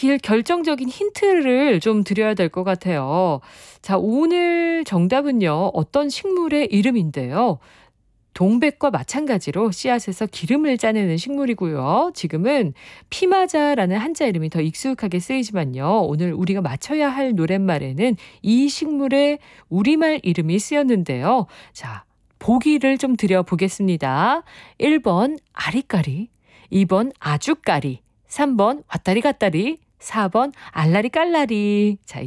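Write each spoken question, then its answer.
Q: 자, 오늘 정답은요, 어떤 식물의 이름인데요.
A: 2번: 아주까리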